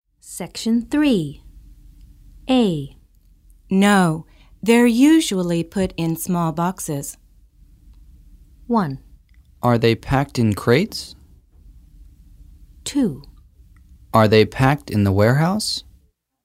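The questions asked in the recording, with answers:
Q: No, they're usually put in small boxes.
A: 1: Are they packed in crates?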